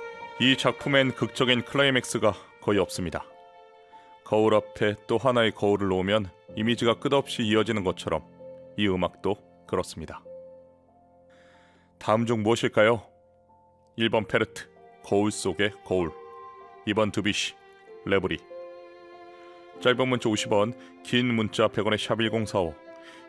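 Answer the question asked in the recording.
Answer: 1: 페르트, 거울 속의 거울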